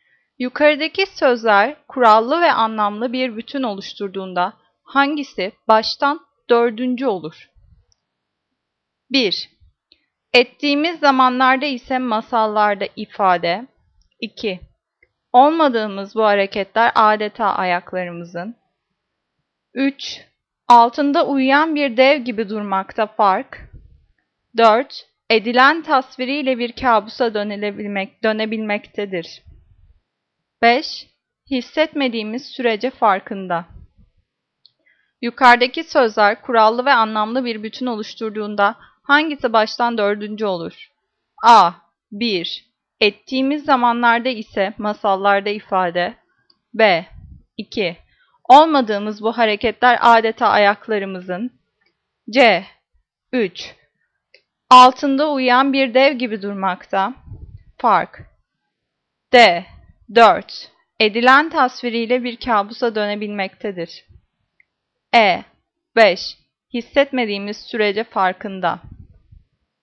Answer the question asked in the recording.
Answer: Cevap A. 1. Ettiğimiz zamanlarda ise masallarda ifade.